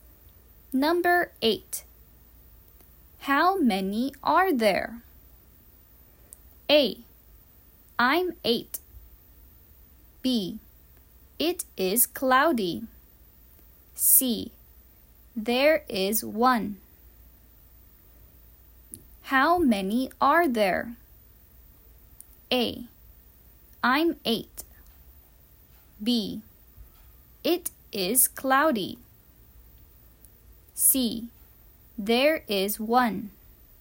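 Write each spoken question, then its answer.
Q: How many are there?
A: C: There is 1.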